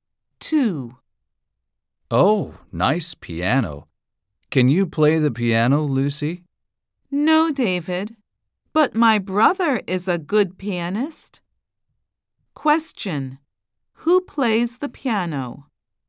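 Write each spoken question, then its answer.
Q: Who plays the piano?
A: Lucy's brother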